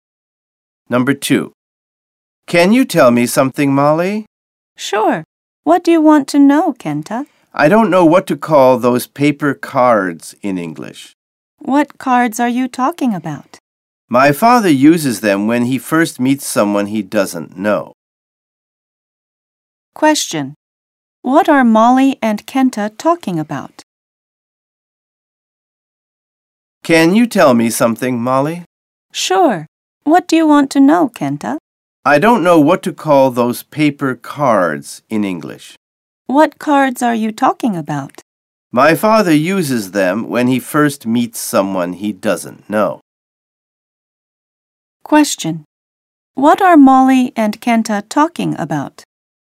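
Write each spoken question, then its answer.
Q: What are Molly and Kenta talking about?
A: Business cards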